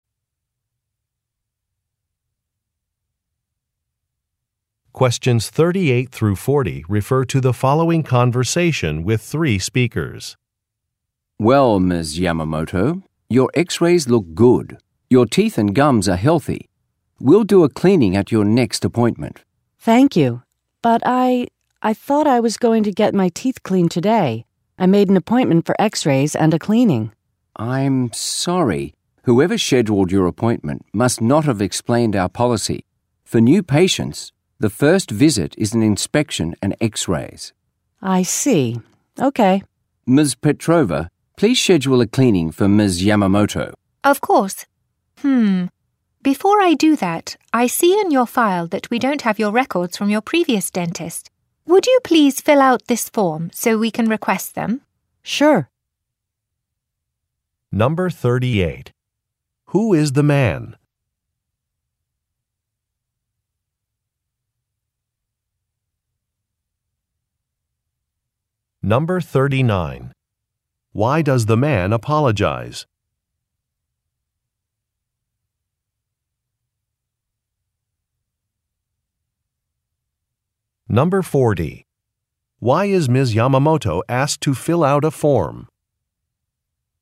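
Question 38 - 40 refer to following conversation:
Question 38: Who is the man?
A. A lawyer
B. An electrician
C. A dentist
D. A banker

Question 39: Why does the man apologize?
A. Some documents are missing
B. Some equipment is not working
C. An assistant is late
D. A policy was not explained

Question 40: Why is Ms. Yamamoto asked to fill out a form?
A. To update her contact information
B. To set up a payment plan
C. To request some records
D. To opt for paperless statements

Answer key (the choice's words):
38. A dentist
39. A policy was not explained
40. To request some records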